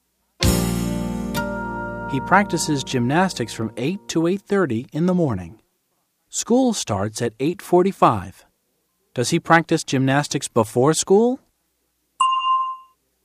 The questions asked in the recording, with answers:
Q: Does he practice gymnastics before school?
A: Yes, he does. He practices gymnastics before school.